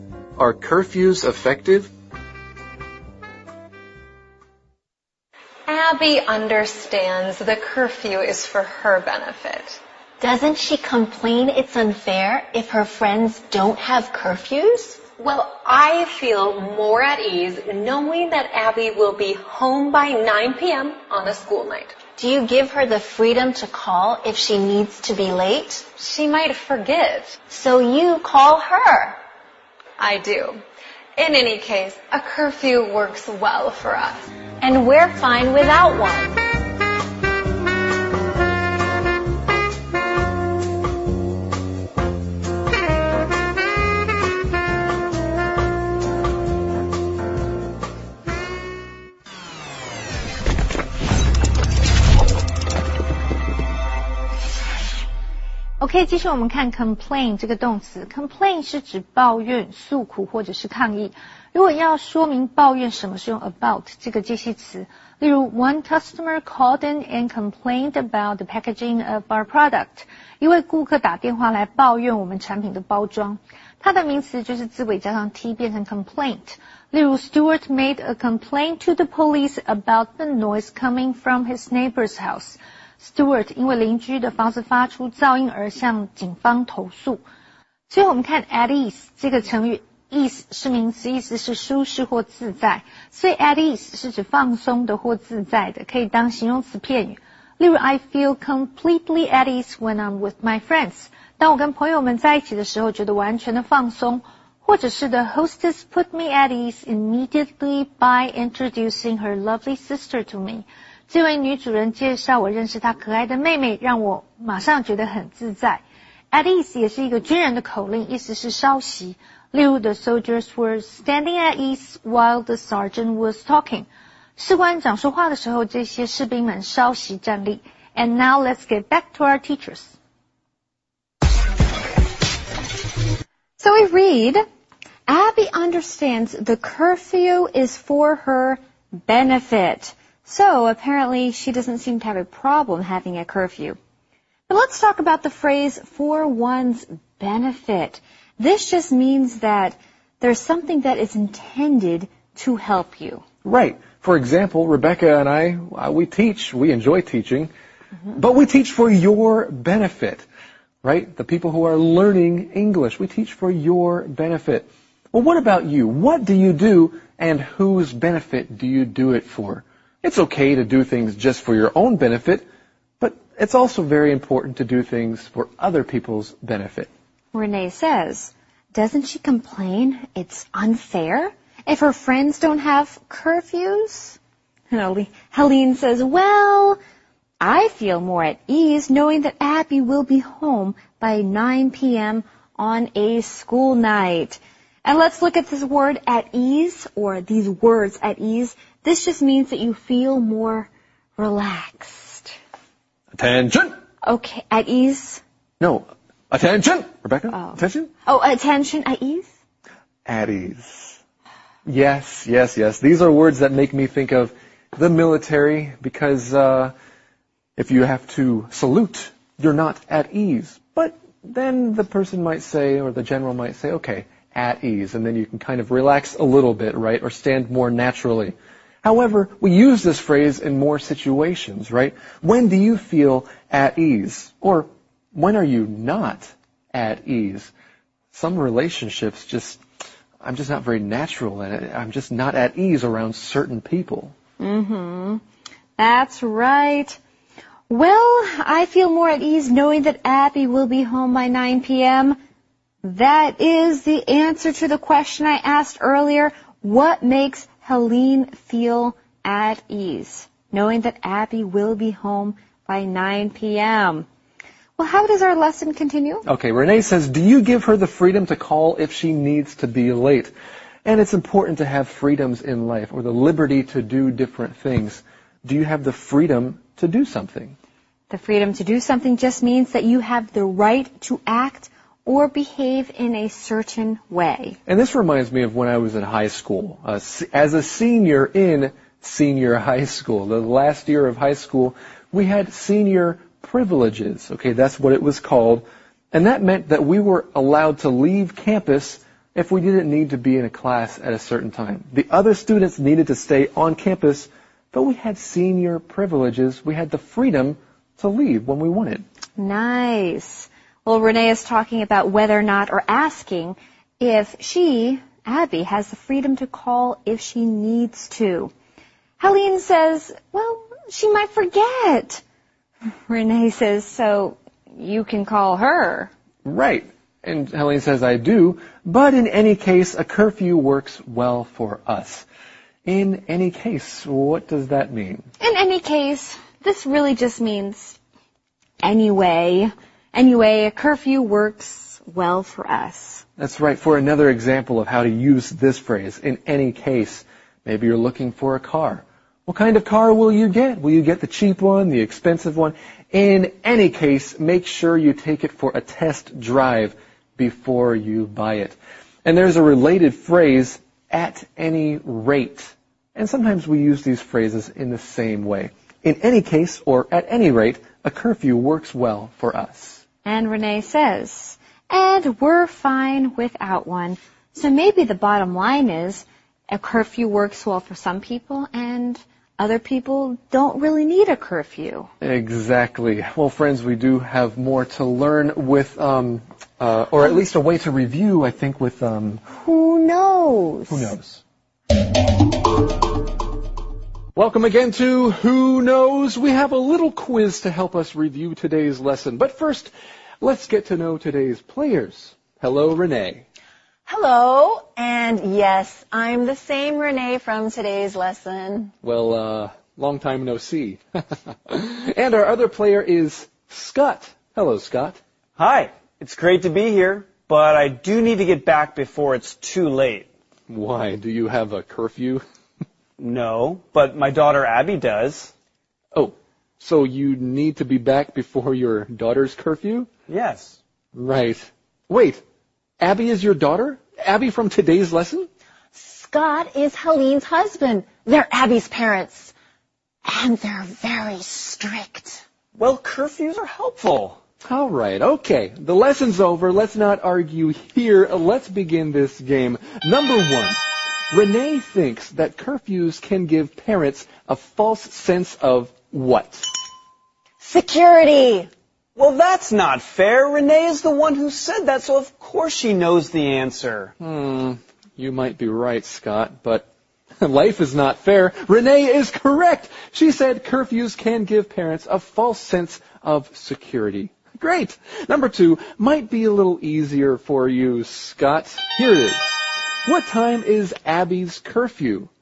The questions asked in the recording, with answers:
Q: What time is Abby's curfew?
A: My daughter's curfew is 9 o'clock.